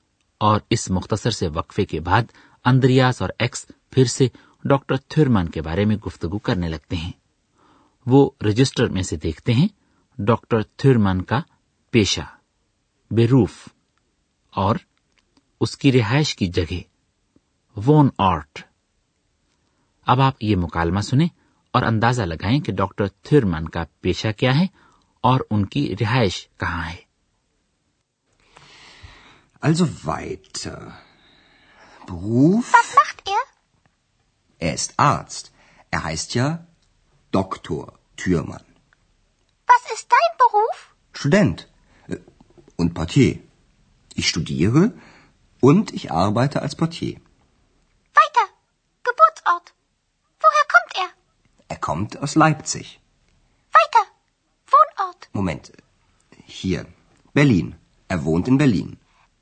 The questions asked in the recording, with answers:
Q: اندازہ لگائیں کہ doctor تھرمان کا پیشہ کیا ہے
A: تو پتا یہ چلا کہ doctor تھرمن ایک medical doctor ہیں

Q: ان کی رہائش کہاں ہے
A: اور Berlin میں رہتے ہیں